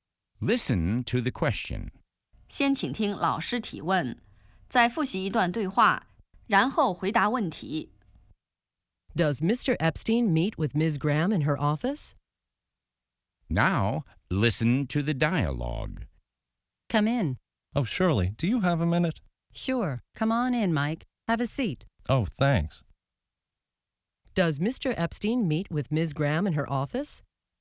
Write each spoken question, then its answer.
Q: Does Mr. Epstein meet with Ms. Graham in her office?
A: Yes, they meet in Ms. Graham's office.